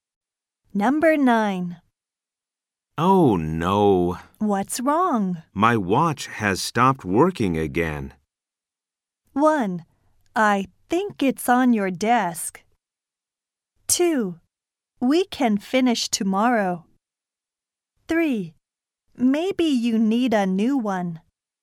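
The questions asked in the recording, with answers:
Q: My watch has stopped working again.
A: 3: Maybe you need a new one.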